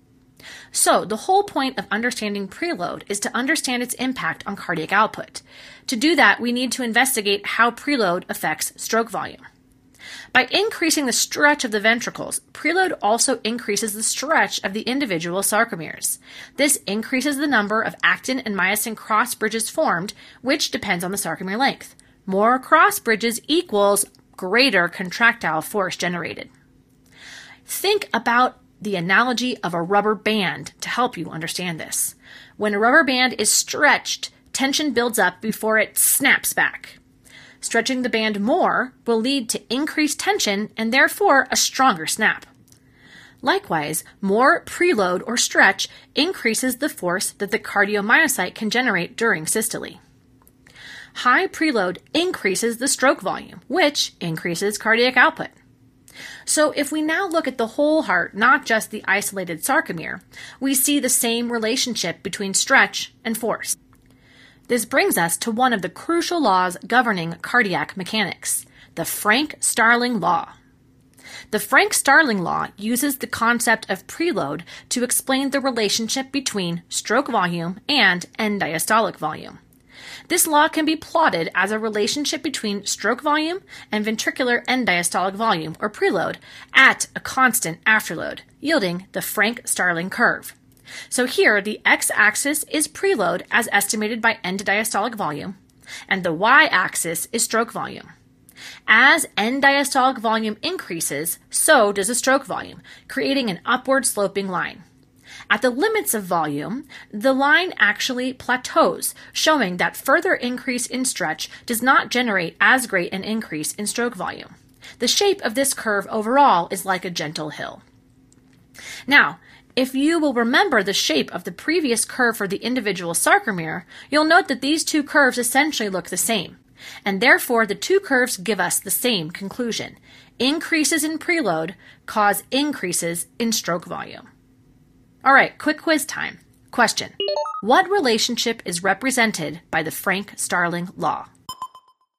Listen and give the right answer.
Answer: Answer is, the Frank Starling Law describes the relationship between preload and stroke volume.